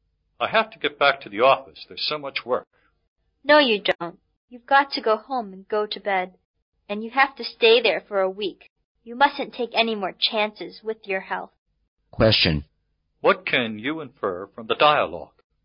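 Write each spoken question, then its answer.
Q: What can you infer from the dialogue?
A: The man is ill and should go home and rest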